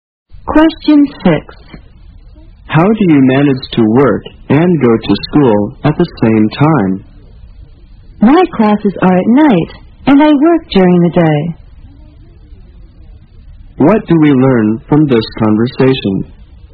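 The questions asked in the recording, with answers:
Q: What do we learn from this conversation?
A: The speaker works during the day and takes classes at night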